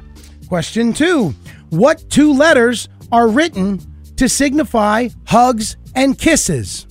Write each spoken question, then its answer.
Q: What two letters are written to signify hugs and kisses?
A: X's and O's.